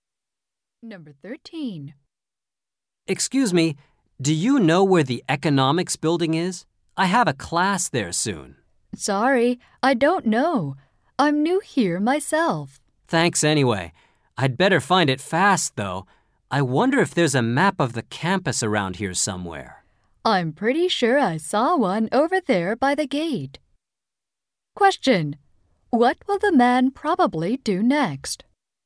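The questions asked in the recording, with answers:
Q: What will the man probably do next?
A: Look for a campus map by the gate.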